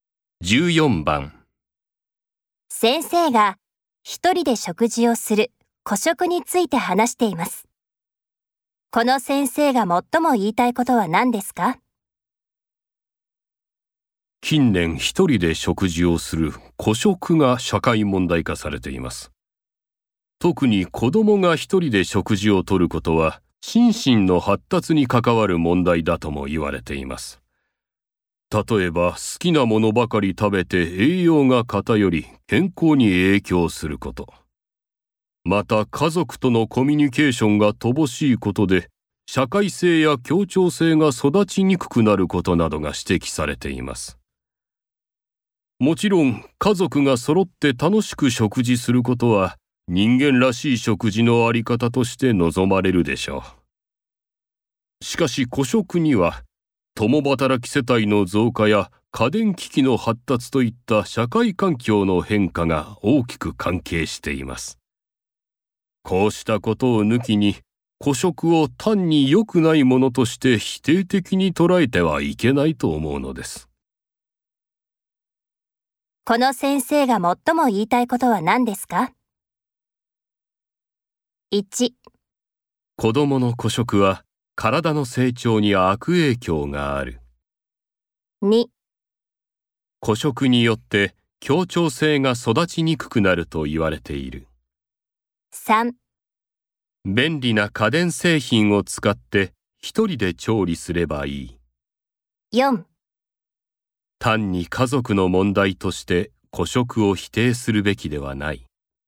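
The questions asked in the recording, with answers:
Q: この先生が最も言いたいことは何ですか?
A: 4: 単に家族の問題として孤食を否定するべきではない。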